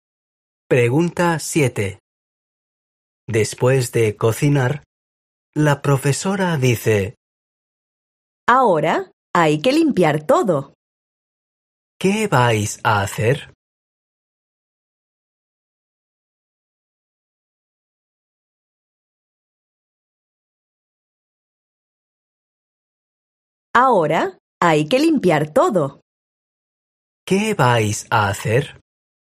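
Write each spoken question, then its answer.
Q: ¿Qué vais a hacer?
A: Limpiar todo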